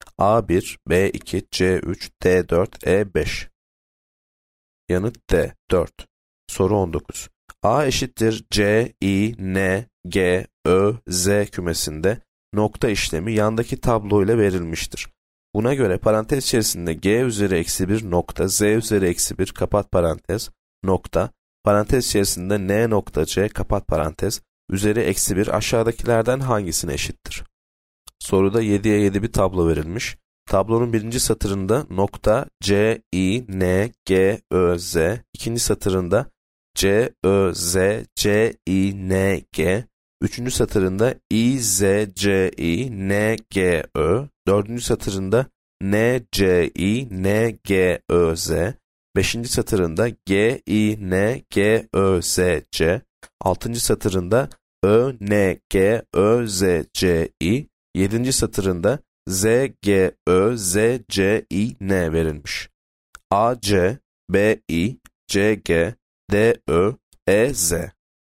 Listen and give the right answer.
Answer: Yanıt A, C.